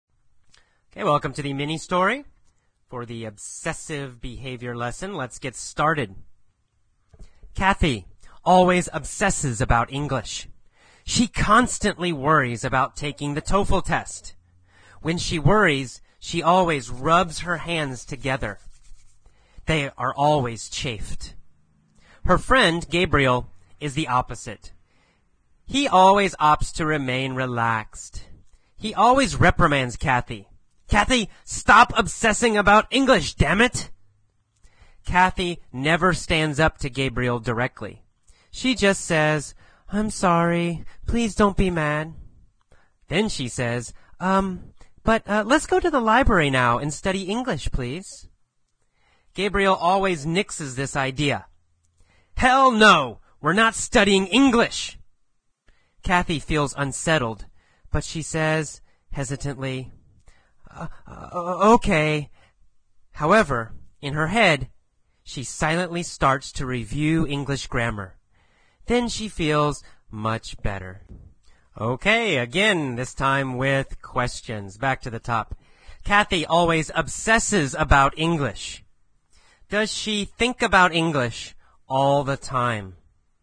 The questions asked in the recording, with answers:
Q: Does she think about English all the time?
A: Yes, that's right. She always thinks about English.